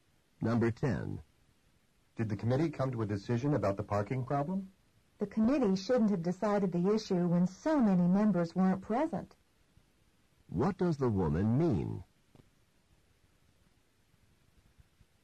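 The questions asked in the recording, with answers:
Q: What does the woman mean?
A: The committee made a decision, but it shouldn't have with so many members absent.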